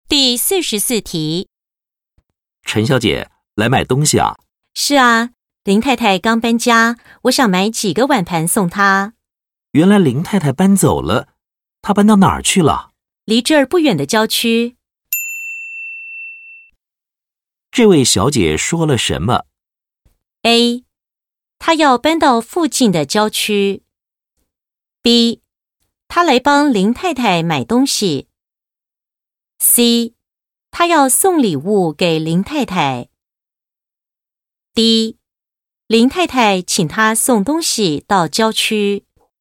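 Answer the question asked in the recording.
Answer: C: 她要送礼物给林太太。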